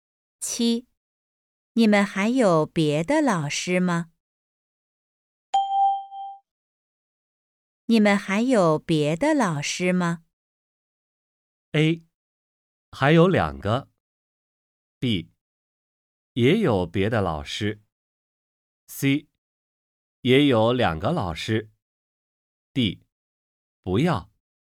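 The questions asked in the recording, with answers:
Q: 你们还有别的老师吗?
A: A: 还有两个。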